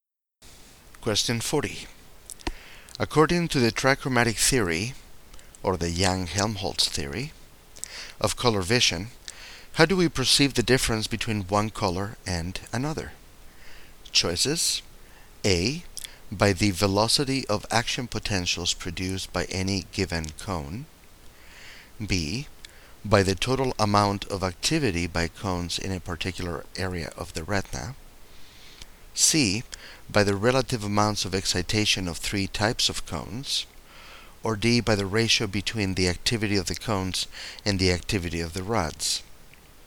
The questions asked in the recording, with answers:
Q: According to the trichromatic theory, or the Young-Helmholtz theory, of color vision, how do we perceive the difference between one color and another?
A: So the correct choice is C, the relative amount of excitation of three types of cones.